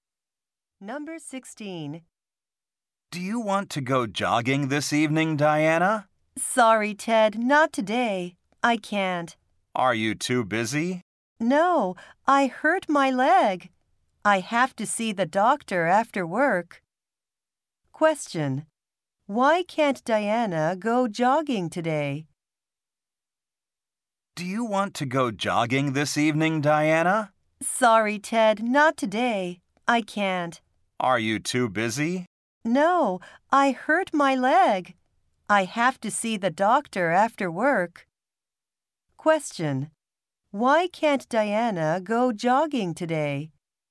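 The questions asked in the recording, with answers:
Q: Why can't Diana go jogging today?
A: She hurt her leg.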